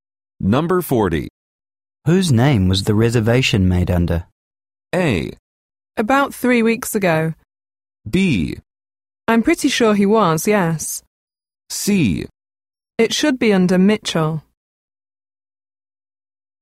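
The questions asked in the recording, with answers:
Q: Whose name was the reservation made under?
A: C: It should be under Mitchell.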